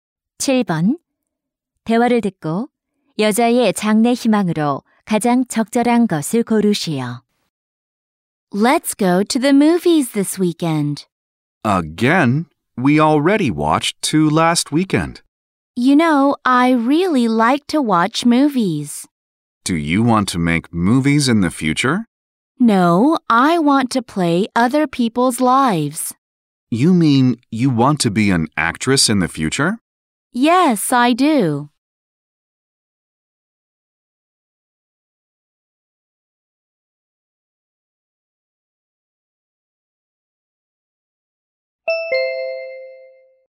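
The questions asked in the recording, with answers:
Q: 대화를 듣고 여자의 장래 희망으로 가장 적절한 것을 고르시오.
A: 배우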